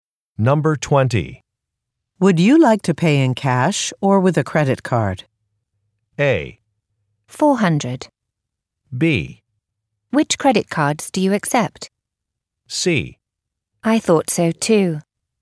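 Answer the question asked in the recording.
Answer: B: Which credit cards do you accept?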